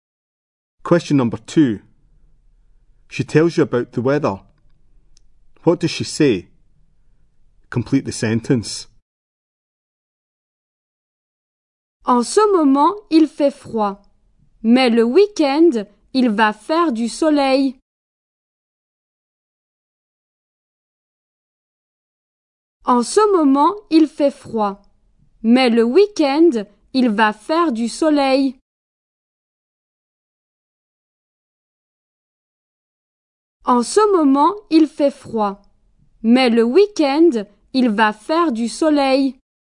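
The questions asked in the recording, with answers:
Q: What does she say?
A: It is cold now, but at the weekend it will be sunny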